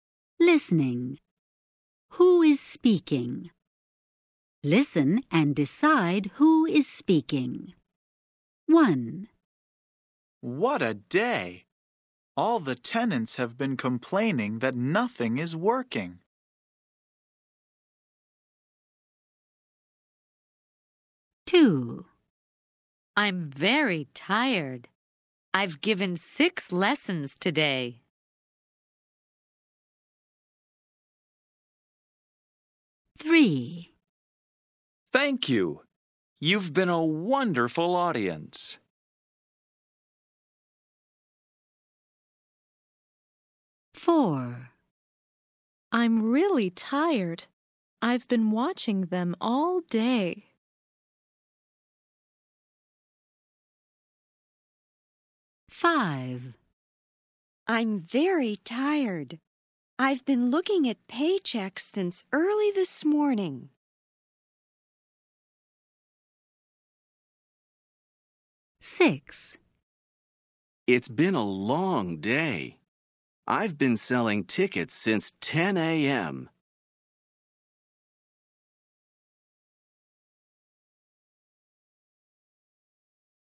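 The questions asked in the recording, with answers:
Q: Who is speaking?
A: A teacher

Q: Who is speaking?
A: A ticket seller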